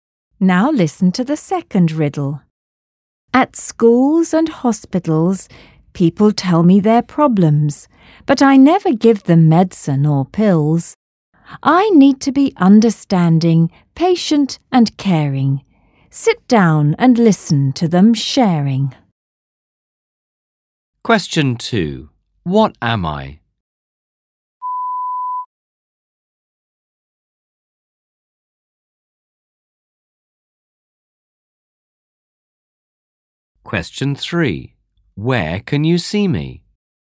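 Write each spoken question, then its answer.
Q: Where can you see me?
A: at schools and hospitals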